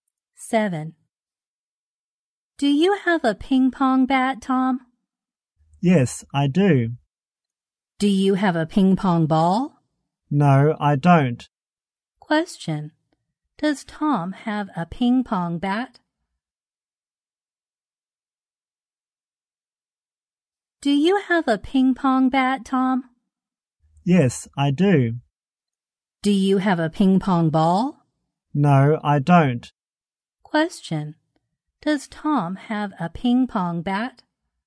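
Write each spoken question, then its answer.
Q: Does Tom have a ping pong bat?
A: Yes, he does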